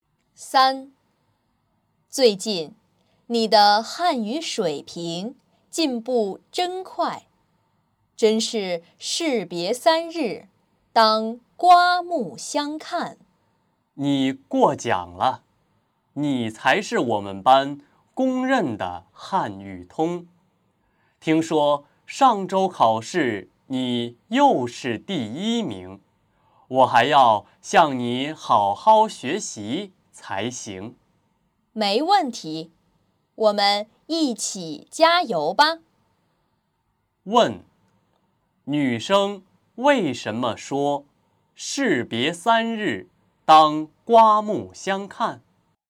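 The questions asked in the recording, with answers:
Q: 女生为什么说士别三日,当刮目相看?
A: 因为对方的汉语水平最近进步很快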